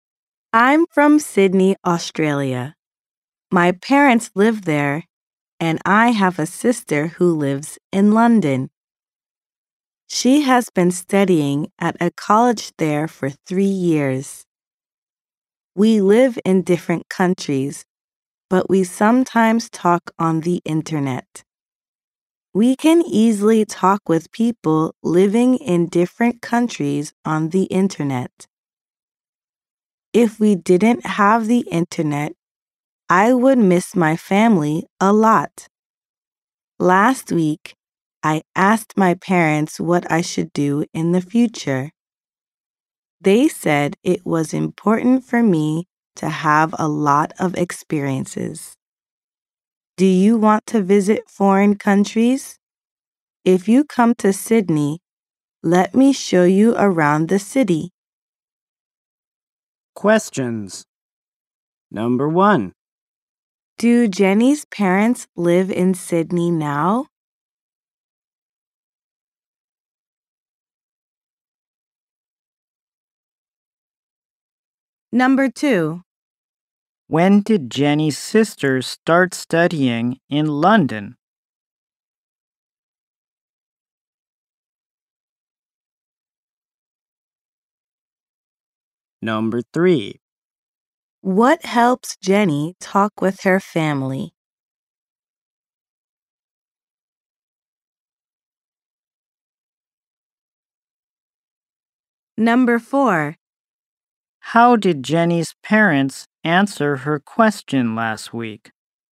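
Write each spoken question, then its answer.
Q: Do Jenny's parents live in Sydney now?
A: Yes, they do.

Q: When did Jenny's sister start studying in London?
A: Three years ago.

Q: What helps Jenny talk with her family?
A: The internet.

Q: How did Jenny's parents answer her question last week?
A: They said it was important for her to have a lot of experiences.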